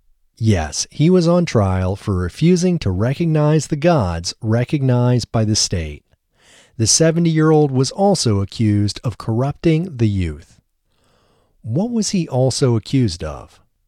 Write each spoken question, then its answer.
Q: What was he also accused of?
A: He was also accused of corrupting the youth.